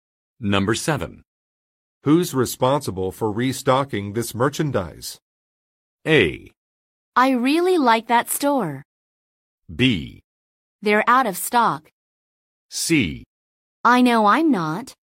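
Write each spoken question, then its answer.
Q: Who's responsible for restocking this merchandise?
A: C: I know I'm not.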